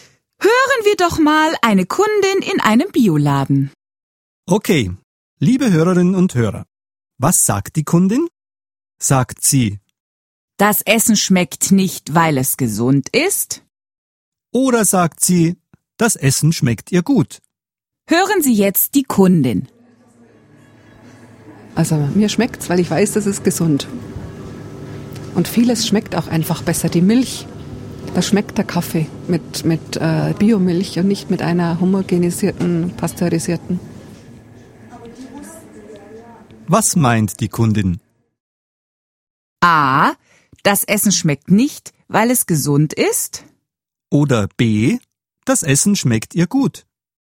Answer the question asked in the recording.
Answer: die Antwort ist B. Das Essen schmeckt ihr gut.